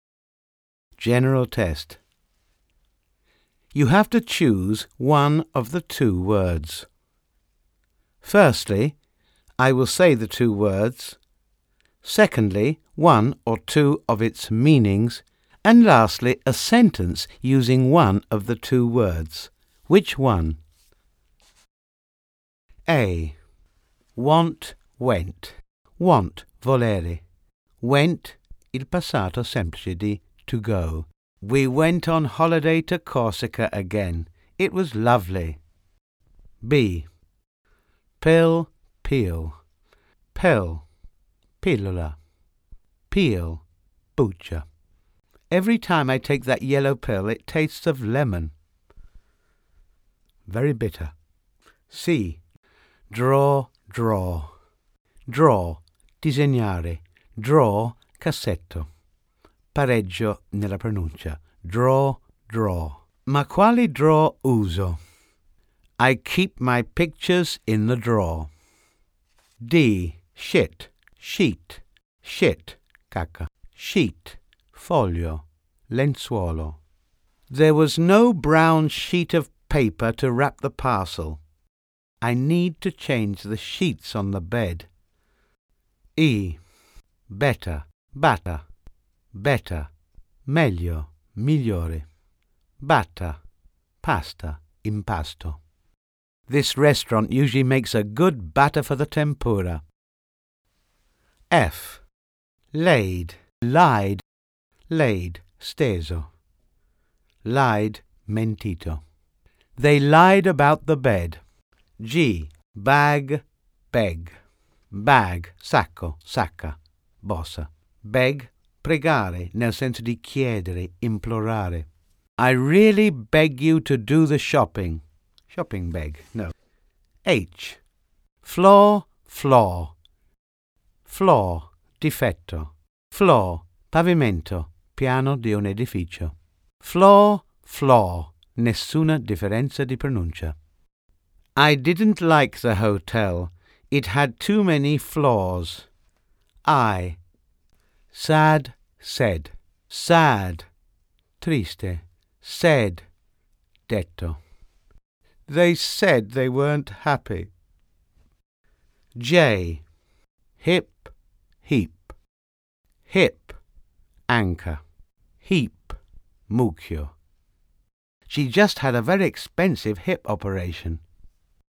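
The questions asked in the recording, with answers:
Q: Which one? A. Want, went.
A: went

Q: B. Pill, peel.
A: pill

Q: C. Draw, draw.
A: drawer

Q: D. Shit, sheet.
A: sheet

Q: E. Better, batta.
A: batter

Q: F. Laid, lied.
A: lied

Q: G. Bag, beg.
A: beg

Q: I. Sad, said.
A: said

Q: J. Hip, heap.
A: hip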